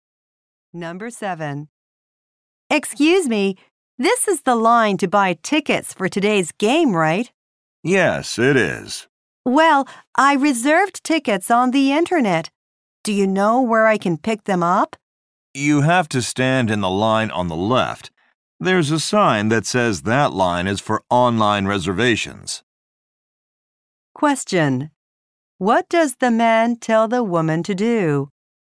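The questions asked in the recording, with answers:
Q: What does the man tell the woman to do?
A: Stand in the line on the left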